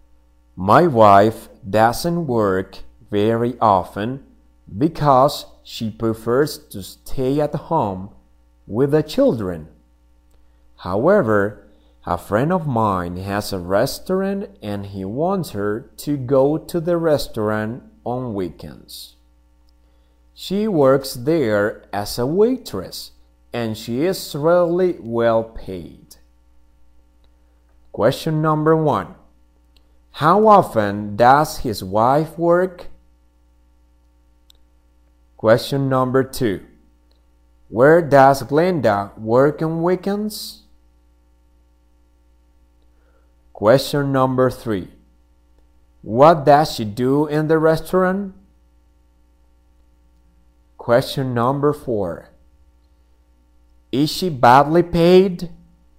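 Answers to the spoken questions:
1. Not very often
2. At a friend's restaurant
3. She works as a waitress
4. No, she is really well paid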